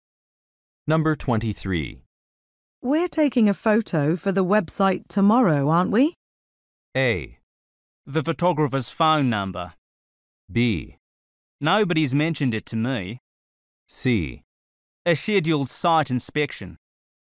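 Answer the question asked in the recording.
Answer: B: Nobody's mentioned it to me.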